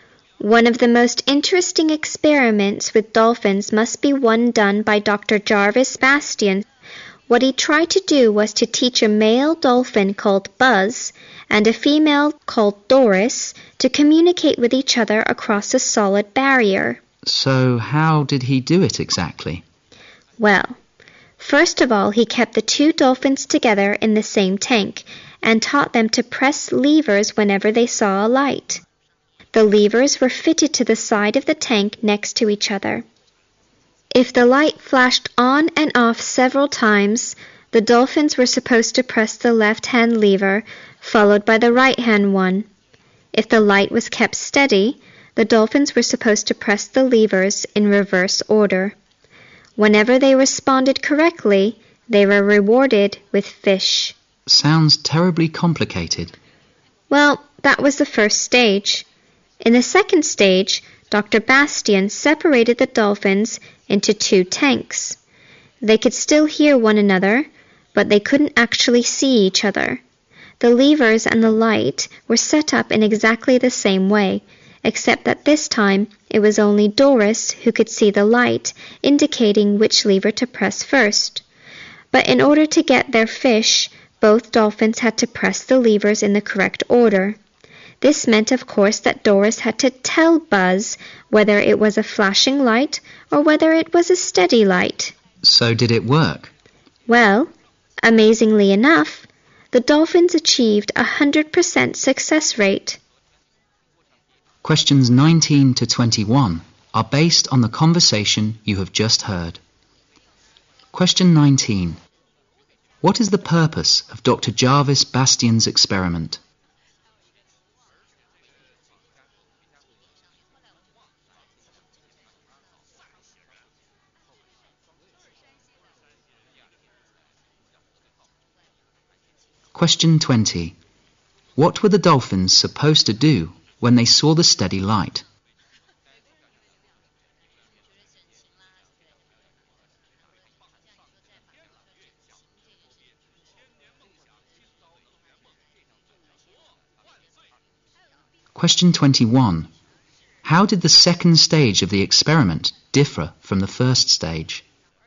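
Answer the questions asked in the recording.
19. To see if dolphins could communicate with each other
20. Press the right-hand lever first, then the left-hand one
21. The dolphins were in separate tanks and only Doris could see the light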